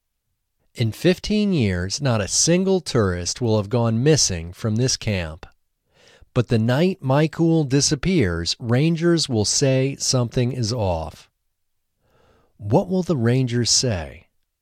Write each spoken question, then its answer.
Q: What will the rangers say?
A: The rangers will say something is off.